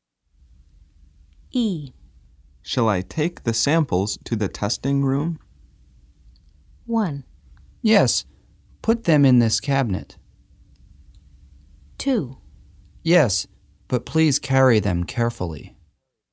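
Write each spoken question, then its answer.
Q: Shall I take the samples to the testing room?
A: 2: Yes, but please carry them carefully.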